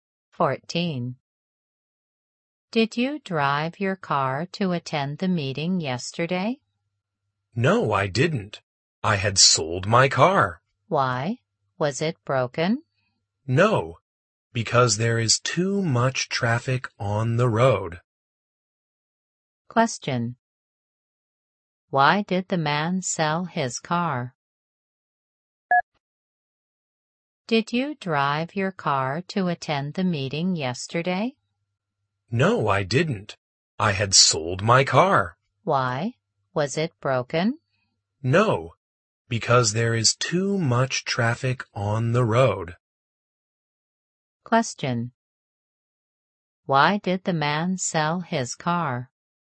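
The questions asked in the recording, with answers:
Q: Why did the man sell his car?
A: Because there is too much traffic on the road.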